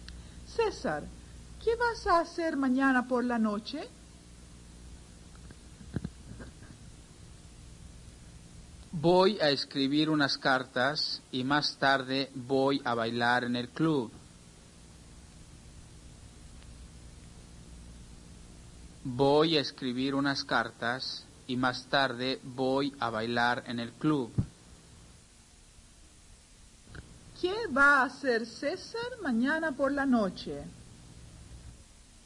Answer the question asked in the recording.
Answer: César va a escribir unas cartas y más tarde va a bailar en el club.